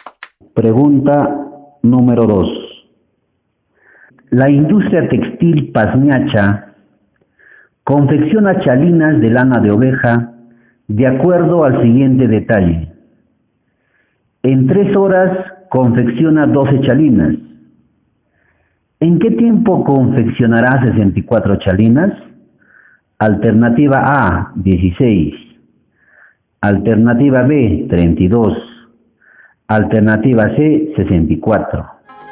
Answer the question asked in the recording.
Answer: La A.